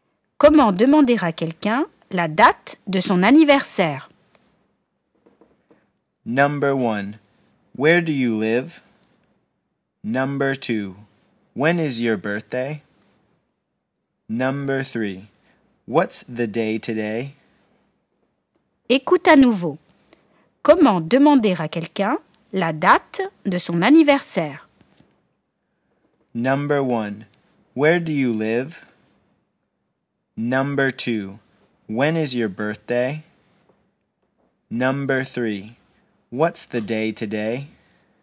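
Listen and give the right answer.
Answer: 2: When is your birthday?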